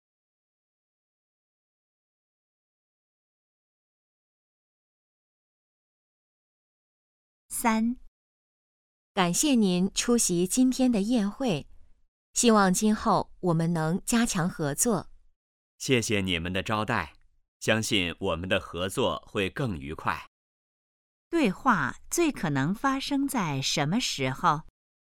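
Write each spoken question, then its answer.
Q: 对话最可能发生在什么时候?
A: 宴会上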